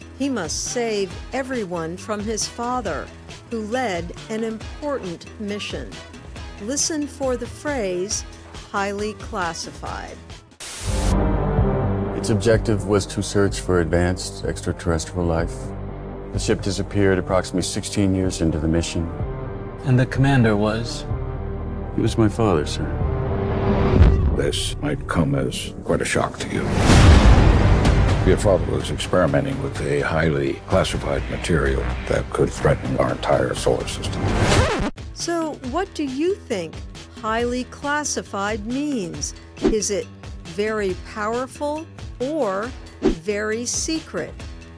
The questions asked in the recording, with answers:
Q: So, what do you think highly classified means?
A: Highly classified means very secret.